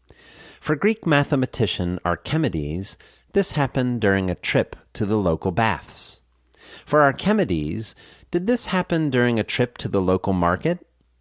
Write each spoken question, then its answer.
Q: For Archimedes, did this happen during a trip to the local market?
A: No, it happened during a trip to the local baths.